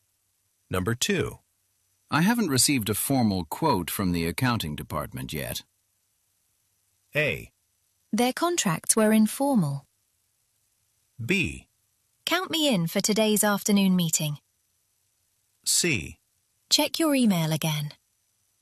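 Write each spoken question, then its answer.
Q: I haven't received a formal quote from the accounting department yet.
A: C: Check your email again.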